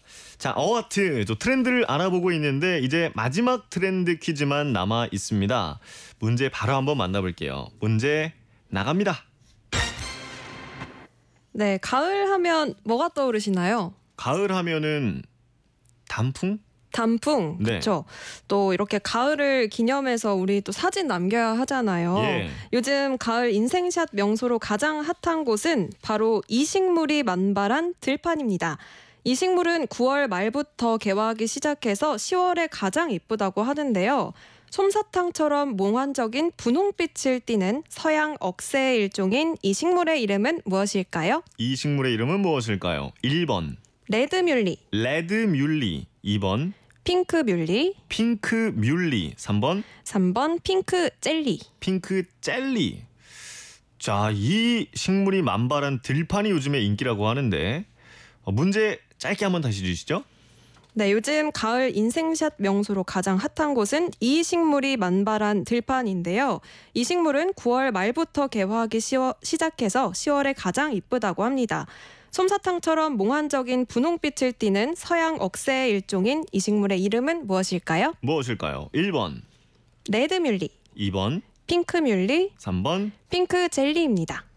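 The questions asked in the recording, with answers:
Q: 솜사탕처럼 몽환적인 분홍빛을 띠는 서양 억새의 일종인 이식물의 이름은 무엇일까요?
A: 2: 핑크 뮬리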